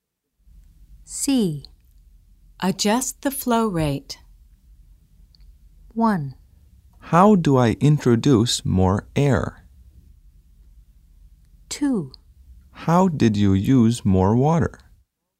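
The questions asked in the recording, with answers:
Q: Adjust the flow rate.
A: 1: How do I introduce more air?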